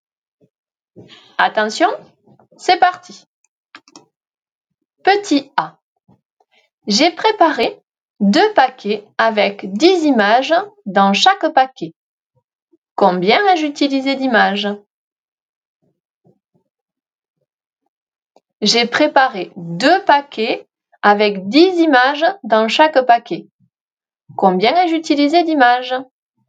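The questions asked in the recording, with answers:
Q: Combien ai-je utilisé d'images?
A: 20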